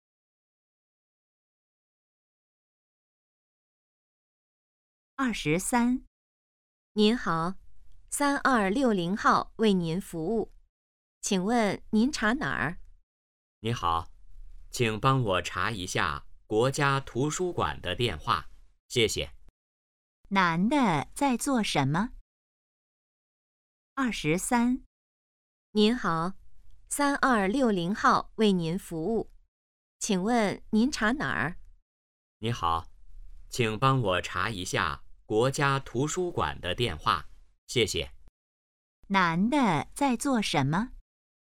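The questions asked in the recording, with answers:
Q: 男的在做什么?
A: 打电话查电话号码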